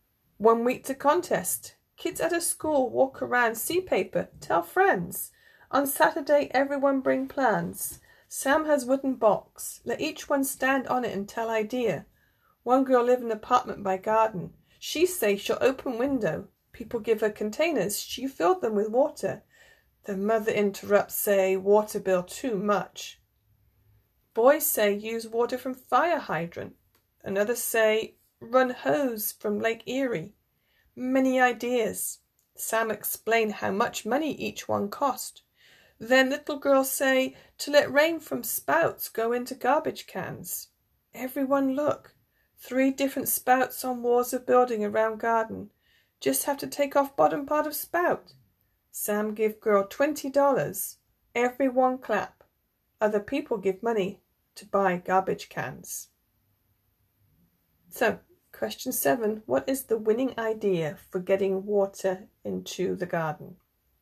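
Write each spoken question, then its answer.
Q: What is the winning idea for getting water into the garden?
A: Let rain from the spouts go into garbage cans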